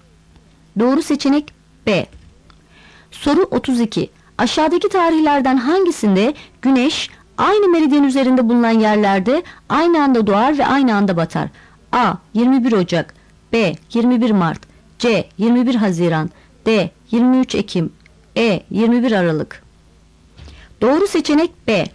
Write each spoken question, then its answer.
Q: Aşağıdaki tarihlerden hangisinde güneş aynı meridyen üzerinde bulunan yerlerde aynı anda doğar ve aynı anda batar?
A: Doğru seçenek B.